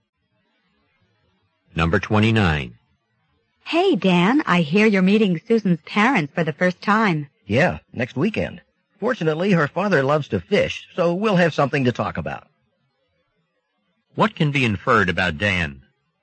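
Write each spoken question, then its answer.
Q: What can be inferred about Dan?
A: He likes fishing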